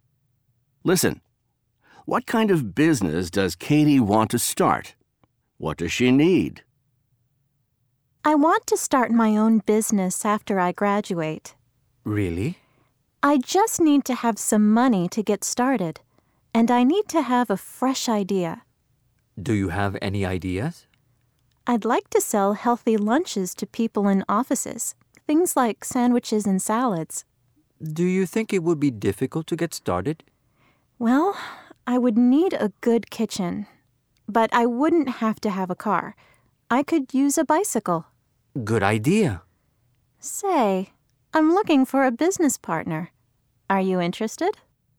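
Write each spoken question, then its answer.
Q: What kind of business does Katie want to start?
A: Selling healthy lunches (sandwiches and salads) to people in offices

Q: What does she need?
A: Some money, a fresh idea, and a good kitchen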